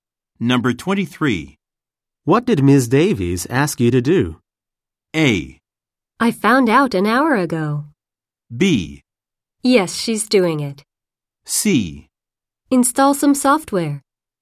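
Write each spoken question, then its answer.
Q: did Ms. Davies ask you to do?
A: C: Install some software.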